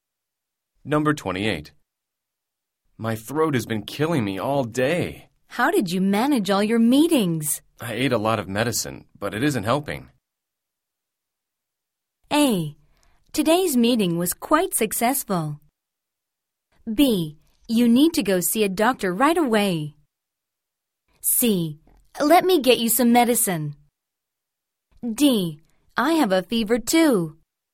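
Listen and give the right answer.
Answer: B: You need to go see a doctor right away.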